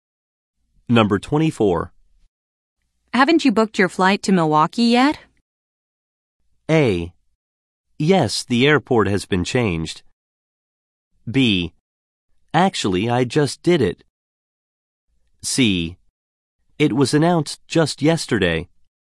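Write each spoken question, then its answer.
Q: Haven't you booked your flight to Milwaukee yet?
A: B: Actually, I just did it.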